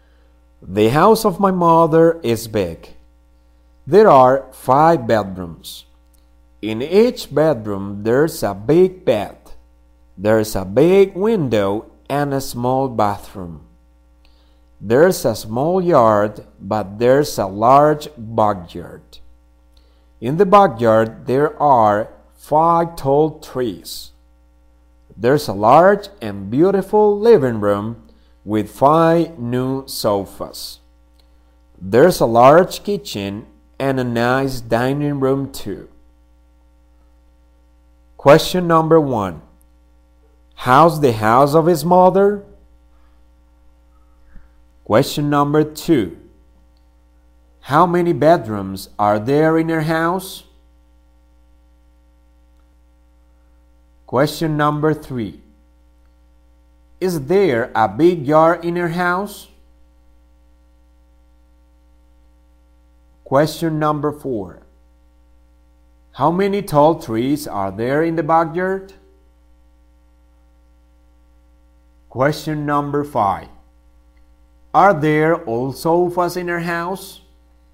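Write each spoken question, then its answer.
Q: How's the house of his mother?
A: Big

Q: How many bedrooms are there in your house?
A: Five

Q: Is there a big yard in your house?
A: No, a small yard

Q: How many tall trees are there in the backyard?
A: Five

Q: Are there old sofas in your house?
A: No, new sofas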